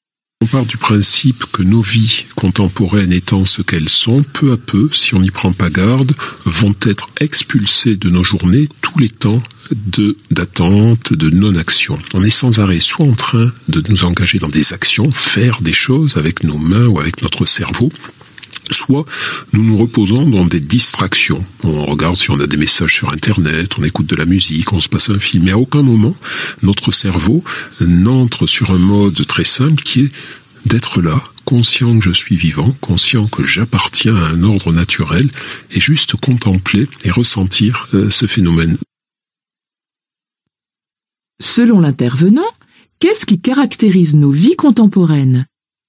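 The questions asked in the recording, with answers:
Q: Selon l'intervenant, qu'est-ce qui caractérise nos vies contemporaines ?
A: Les temps d'attente et de non-action en disparaissent peu à peu : on est sans cesse occupé à agir ou à se distraire.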